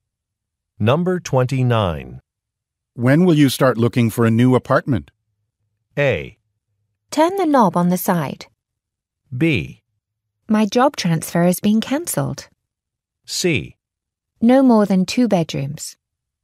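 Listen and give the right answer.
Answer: B: My job transfer has been cancelled.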